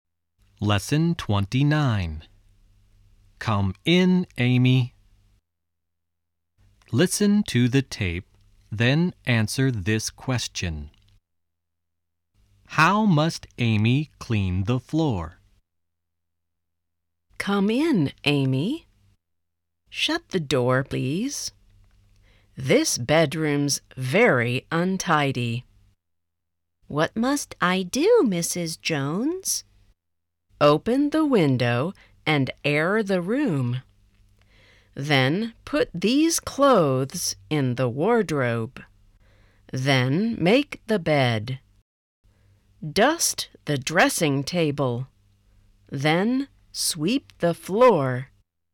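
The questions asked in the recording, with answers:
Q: How must Amy clean the floor?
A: She must sweep it.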